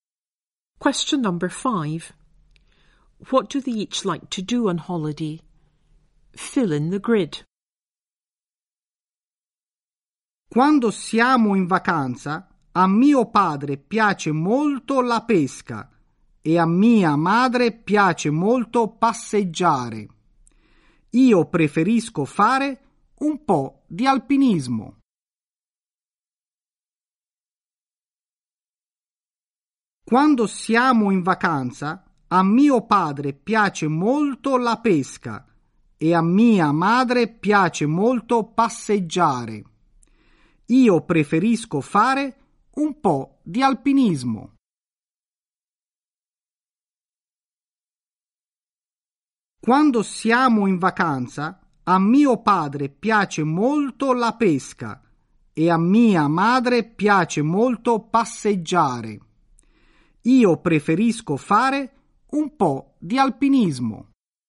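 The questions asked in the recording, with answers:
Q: What do they each like to do on holiday?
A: Father: fishing; mother: walking; Giovanni: mountain climbing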